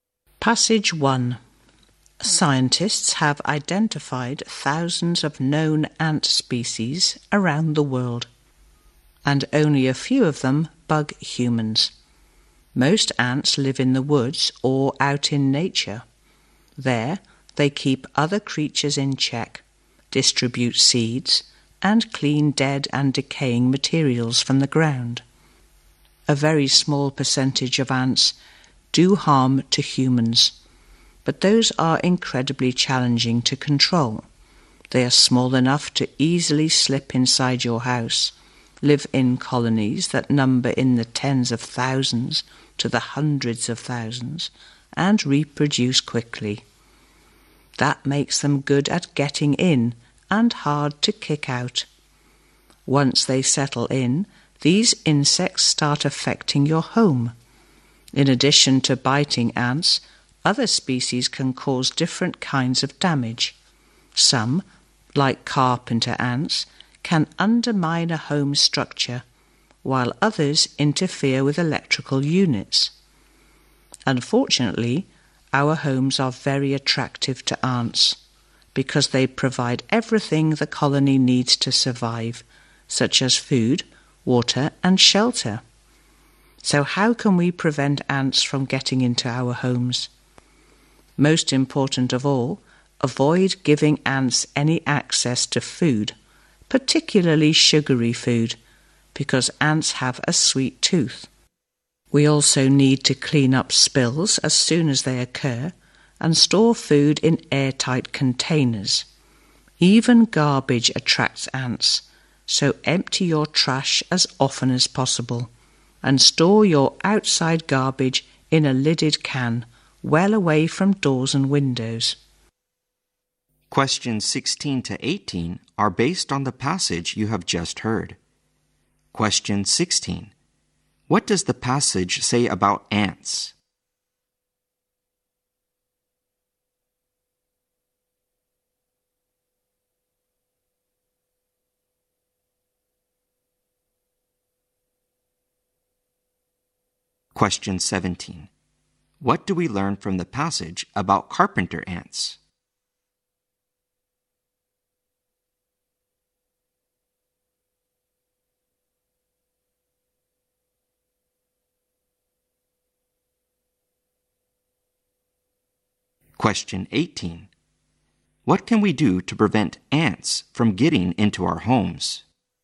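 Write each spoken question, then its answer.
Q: What do we learn from the passage about carpenter ants?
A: They can damage a home's structure.

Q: What can we do to prevent ants from getting into our homes?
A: Keep food, especially sugary food, away from them.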